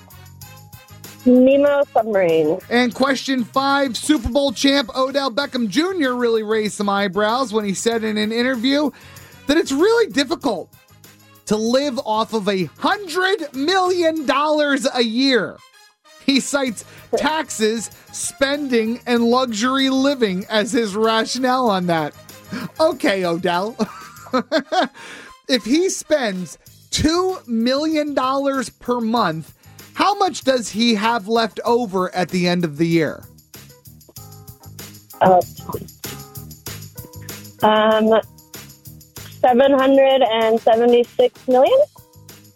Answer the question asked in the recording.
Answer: 76